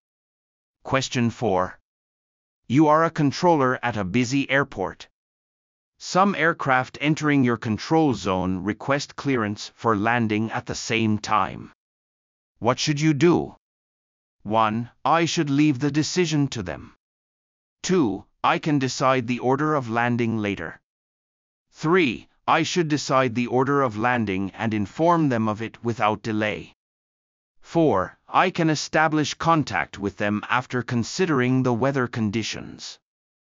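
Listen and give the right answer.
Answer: 3: I should decide the order of landing and inform them of it without delay.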